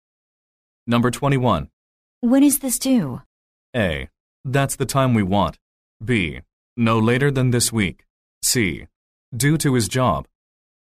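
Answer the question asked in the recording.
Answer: B: No later than this week.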